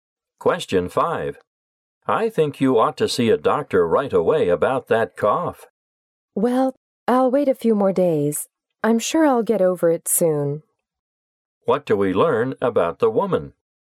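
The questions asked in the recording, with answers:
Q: What do we learn about the woman?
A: She doesn't think her cough is serious and won't see a doctor yet.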